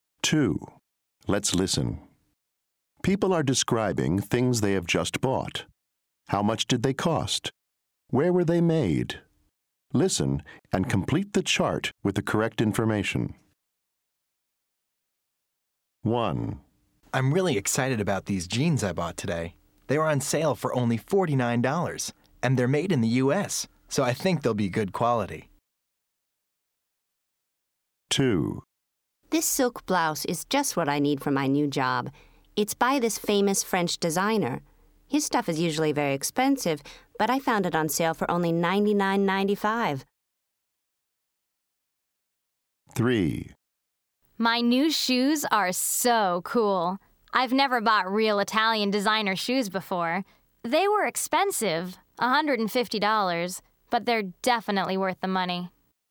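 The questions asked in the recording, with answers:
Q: How much did they cost? Where were they made?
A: $49; made in the U.S.

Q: How much did they cost? Where were they made?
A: $150; Italy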